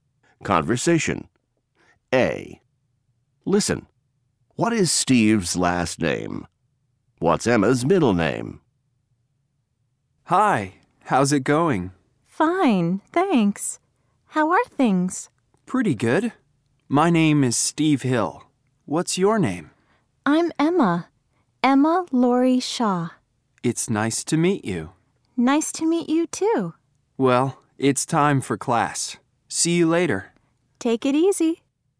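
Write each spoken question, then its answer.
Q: What is Steve's last name?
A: Hill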